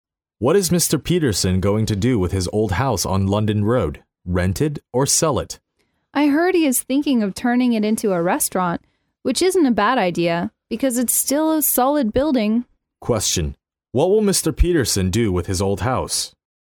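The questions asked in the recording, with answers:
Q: what will Mr. Peterson do with his old house?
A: Turn it into a restaurant.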